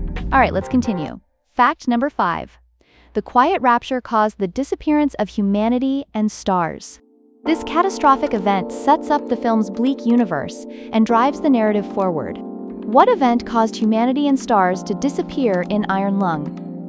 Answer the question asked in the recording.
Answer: Correct answer, the Quiet Rapture.